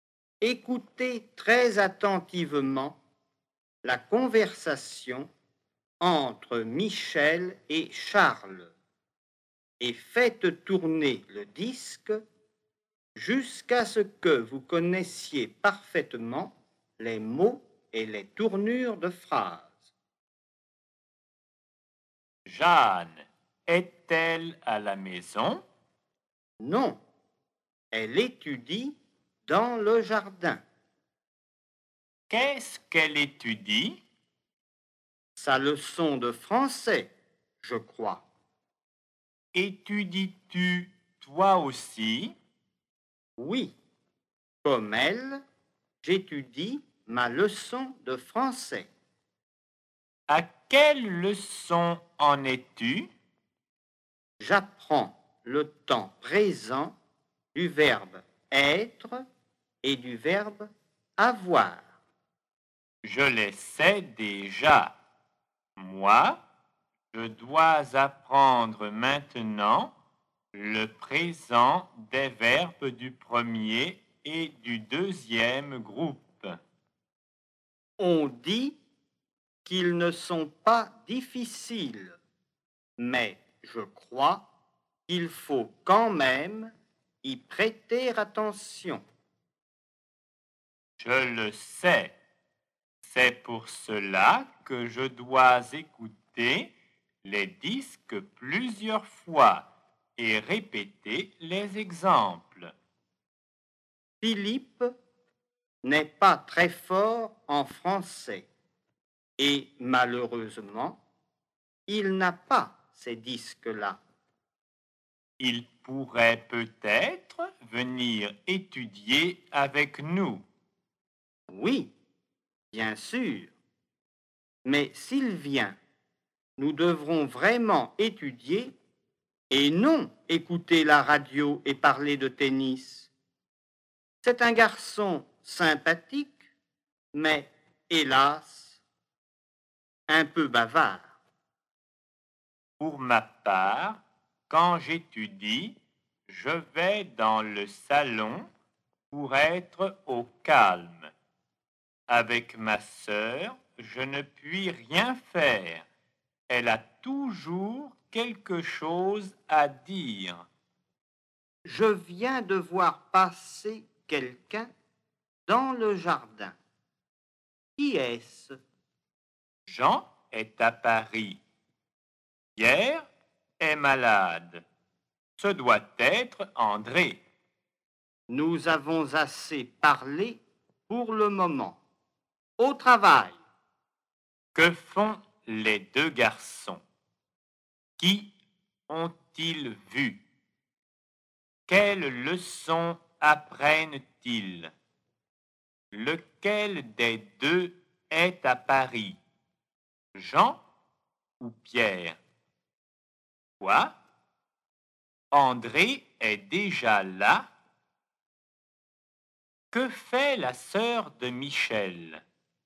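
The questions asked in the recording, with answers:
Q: Que font les deux garçons?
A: Ils étudient leur leçon de français.

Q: Quelles leçons apprennent-ils?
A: Le présent des verbes être et avoir, et le présent des verbes du premier et du deuxième groupe.

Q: Lequel des deux est à Paris?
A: Jean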